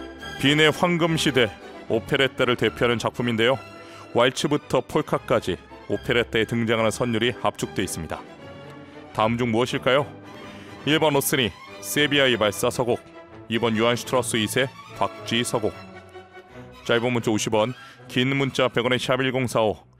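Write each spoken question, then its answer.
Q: 다음 중 무엇일까요?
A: 2: 요한 슈트라우스 2세, 박쥐 서곡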